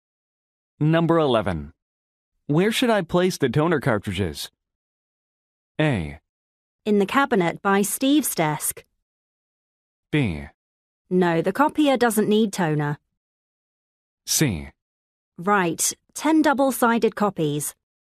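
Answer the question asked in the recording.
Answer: A: In the cabinet by Steve's desk.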